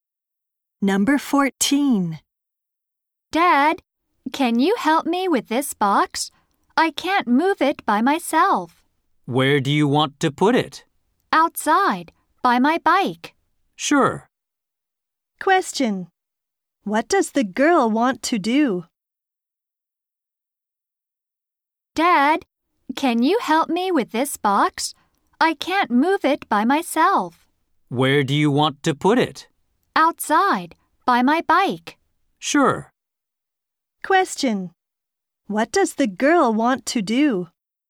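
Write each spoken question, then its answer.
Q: What does the girl want to do?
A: Move a box outside by her bike.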